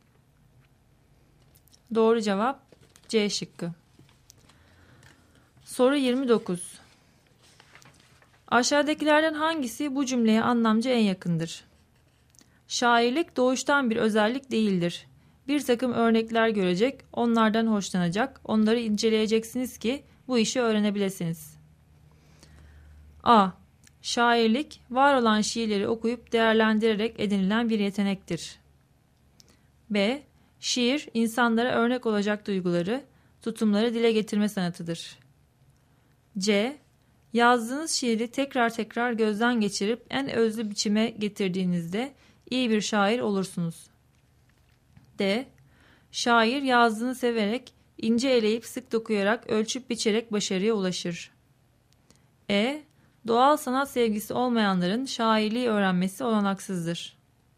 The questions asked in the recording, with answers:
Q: Aşağıdakilerden hangisi bu cümleye anlamca en yakındır?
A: Doğru cevap A şıkkı.